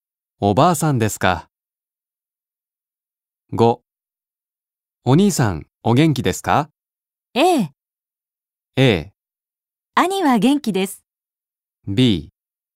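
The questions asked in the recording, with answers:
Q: お兄さん、お元気ですか。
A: A: 兄は元気です。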